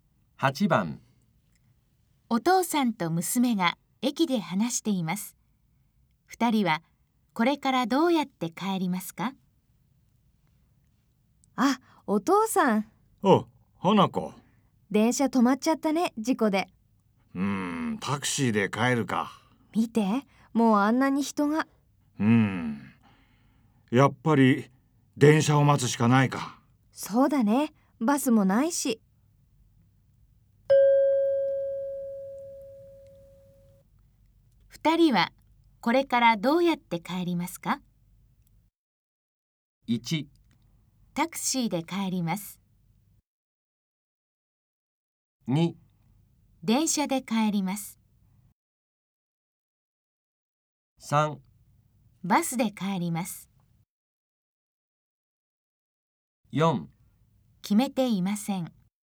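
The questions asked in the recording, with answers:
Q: 二人はこれからどうやって帰りますか?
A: 2: 電車で帰ります。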